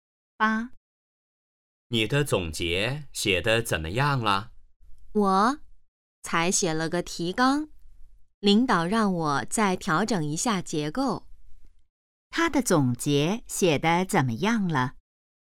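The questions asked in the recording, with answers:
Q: 他的总结写得怎么样了?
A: 只写了提纲,还要调整结构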